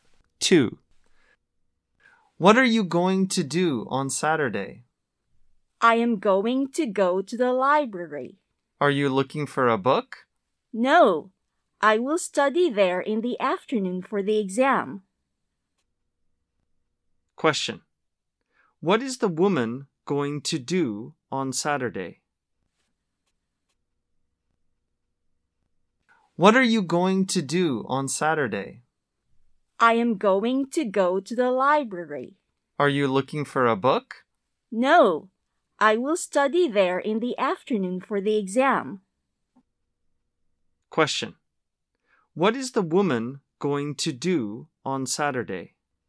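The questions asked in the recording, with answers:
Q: What is the woman going to do on Saturday?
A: Study for the exam at the library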